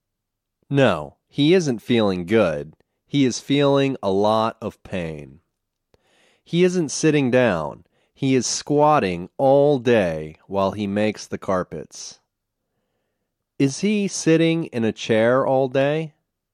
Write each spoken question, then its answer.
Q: Is he sitting in a chair all day?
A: No, he isn't sitting in a chair all day.